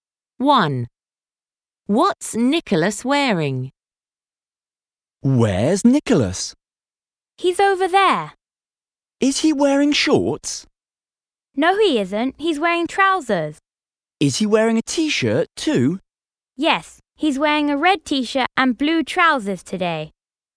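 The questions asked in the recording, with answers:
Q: What's Nicholas wearing?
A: A red t-shirt and blue trousers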